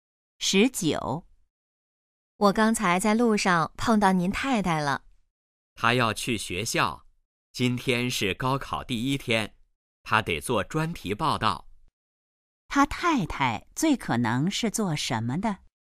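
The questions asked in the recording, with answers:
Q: 他太太最可能是做什么的?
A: 记者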